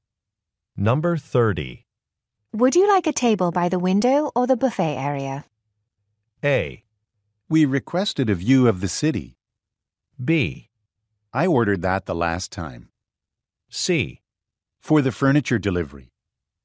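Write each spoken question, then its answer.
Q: Would you like a table by the window or the buffet area?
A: A: We requested a view of the city.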